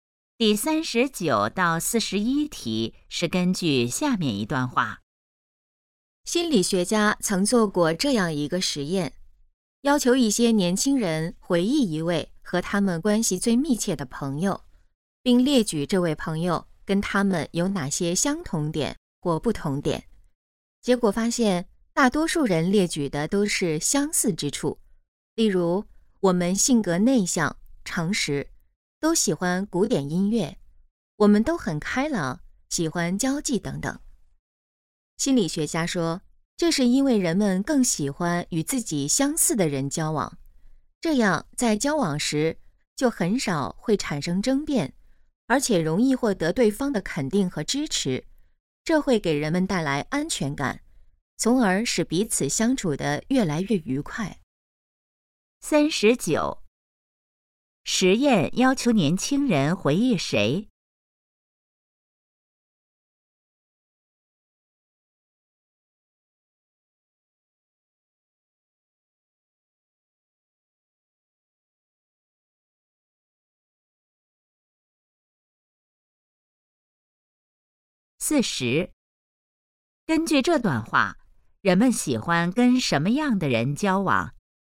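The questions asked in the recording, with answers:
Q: 实验要求年轻人回忆谁?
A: 和他们关系最密切的朋友

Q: 根据这段话,人们喜欢跟什么样的人交往?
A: 与自己相似的人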